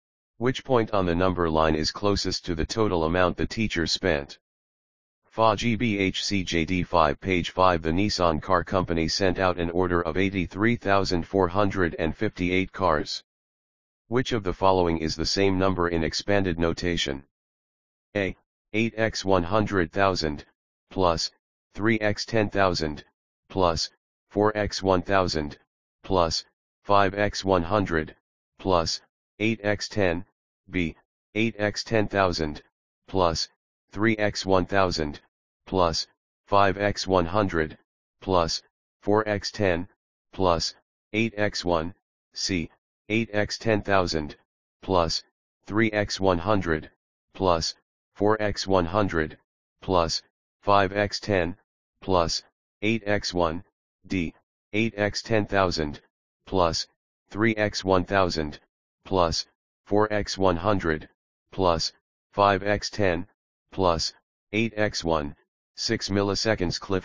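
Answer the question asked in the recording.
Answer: D: 8x10,000, plus, 3x1,000, plus, 4x100, plus, 5x10, plus, 8x1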